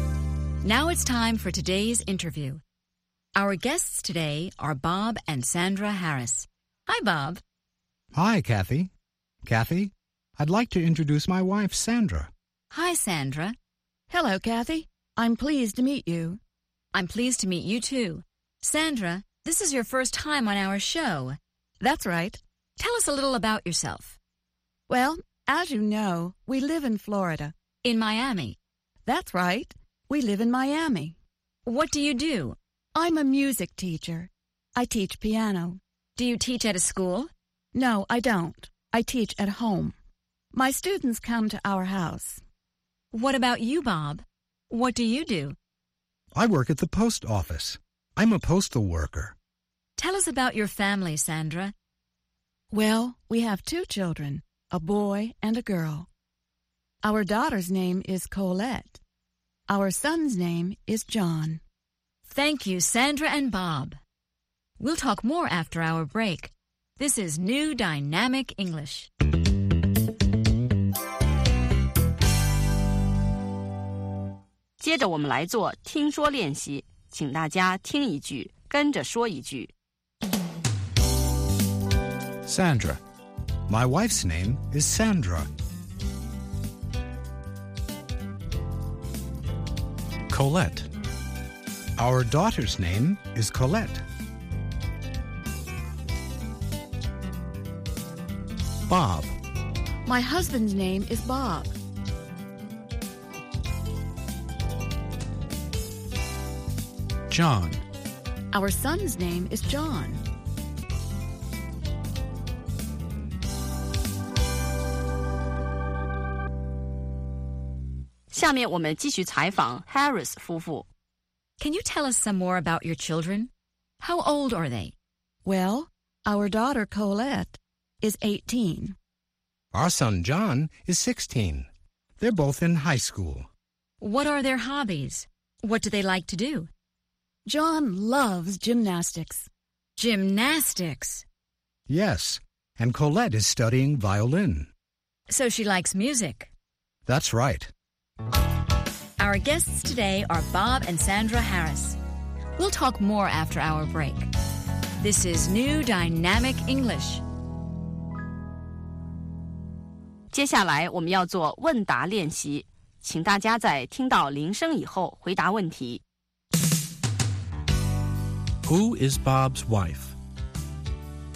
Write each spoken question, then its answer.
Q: Who is Bob's wife?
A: Sandra is Bob's wife.